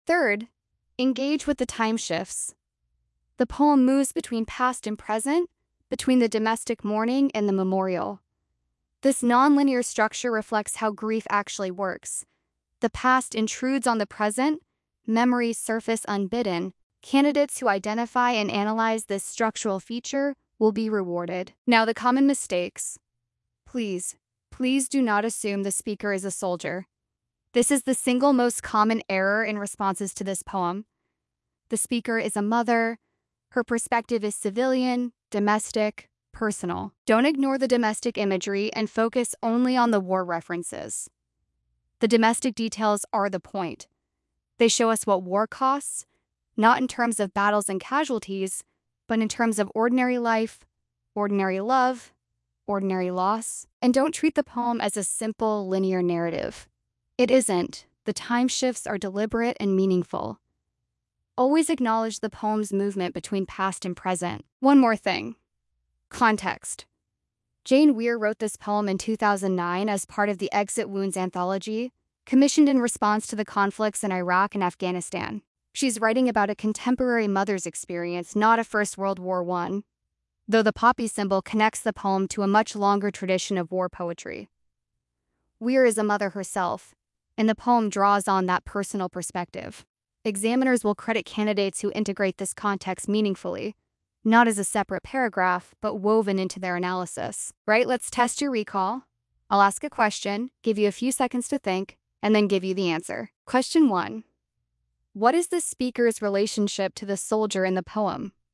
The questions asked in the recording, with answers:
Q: what is the speaker's relationship to the soldier in the poem?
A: The speaker is the soldier's mother.